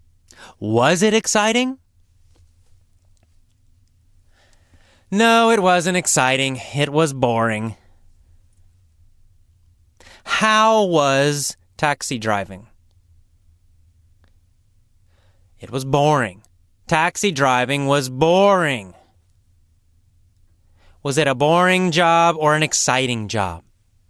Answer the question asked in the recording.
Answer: It was a boring job.